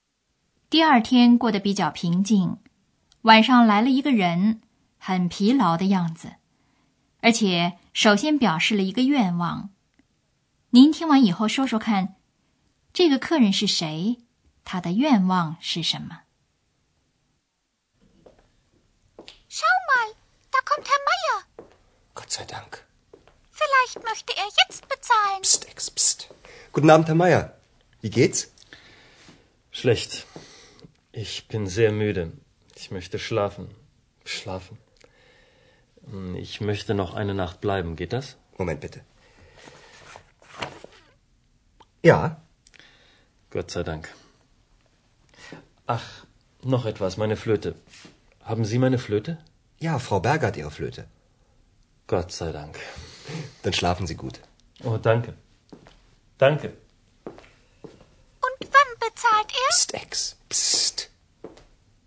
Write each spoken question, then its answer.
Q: 这个客人是谁?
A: 回来的是玛雅先生

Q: 他的愿望是什么?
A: 他首先有一个愿望就是睡觉。